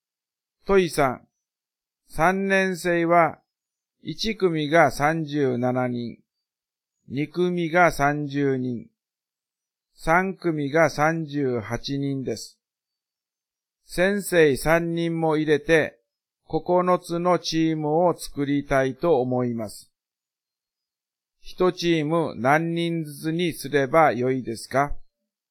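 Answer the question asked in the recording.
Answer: 12人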